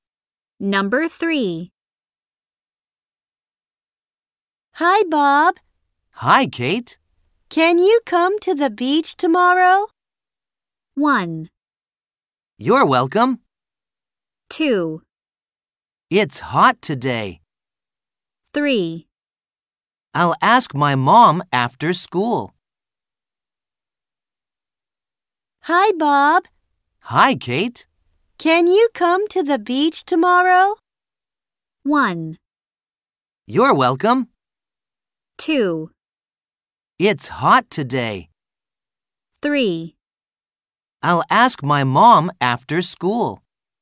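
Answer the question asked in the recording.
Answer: 3: I'll ask my mom after school.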